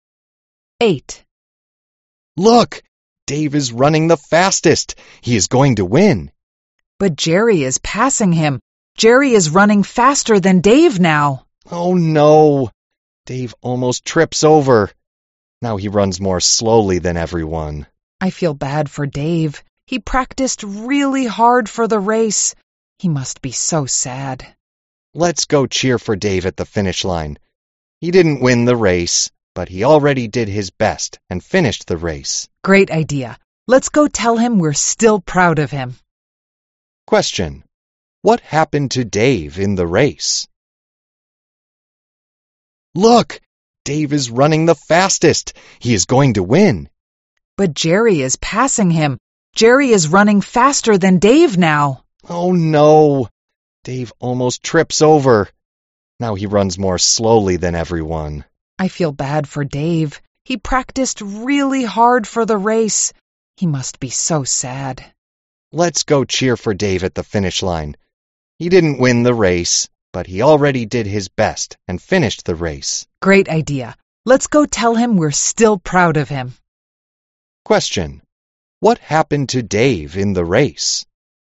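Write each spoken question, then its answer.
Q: What happened to Dave in the race?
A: He almost tripped over, ran slower than everyone and didn't win, but finished the race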